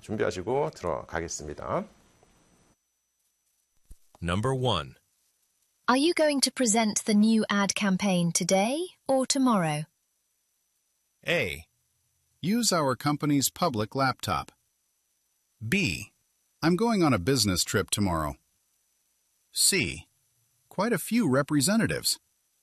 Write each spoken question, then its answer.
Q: Are you going to present the new ad campaign today or tomorrow?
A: 네, 그래서 내일 출장을 간다라는 게 정답이 되겠습니다.